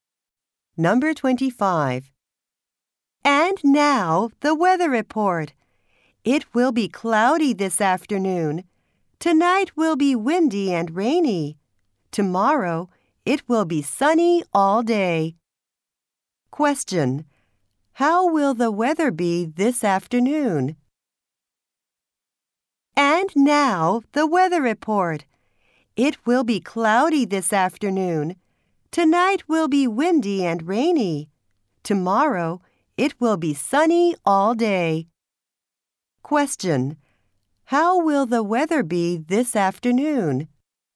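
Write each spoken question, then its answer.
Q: How will the weather be this afternoon?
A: Cloudy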